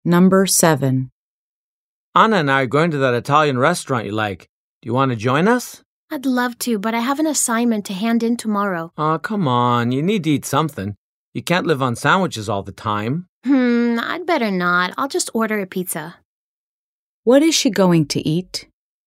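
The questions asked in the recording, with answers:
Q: What is she going to eat?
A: A pizza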